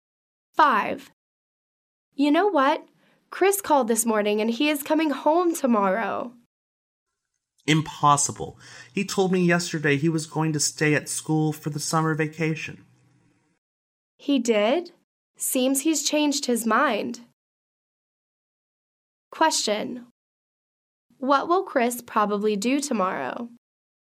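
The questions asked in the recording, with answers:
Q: What will Chris probably do tomorrow?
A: Come home.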